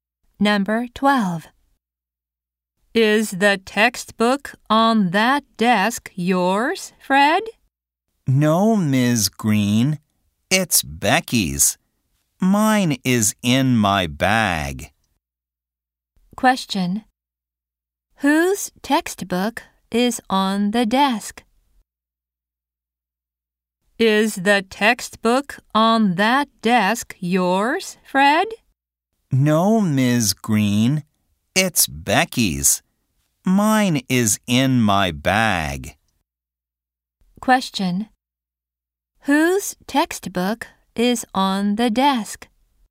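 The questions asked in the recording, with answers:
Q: Whose textbook is on the desk?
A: Becky's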